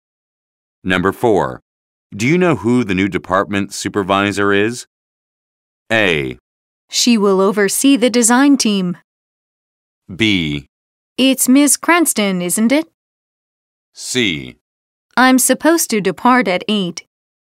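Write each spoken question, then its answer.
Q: Do you know who the new department supervisor is?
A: B: It's Ms. Cranston, isn't it?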